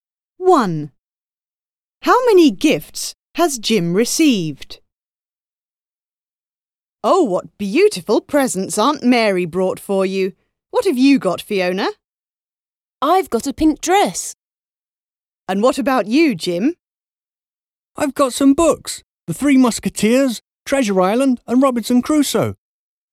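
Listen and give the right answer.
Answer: Three (three books)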